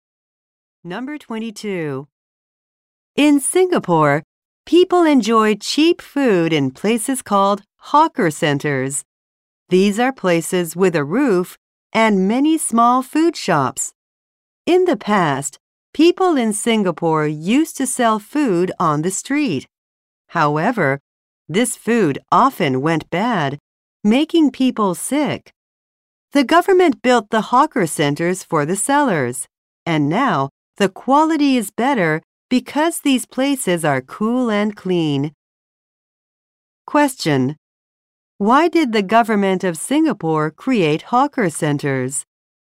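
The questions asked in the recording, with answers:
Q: Why did the government of Singapore create hawker centers?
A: Street food often went bad and made people sick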